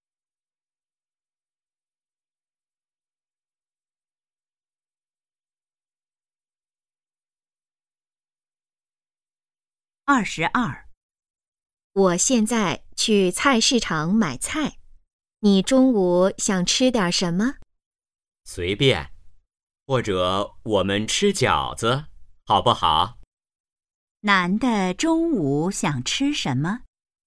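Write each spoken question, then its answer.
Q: 男的中午想吃什么?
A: 饺子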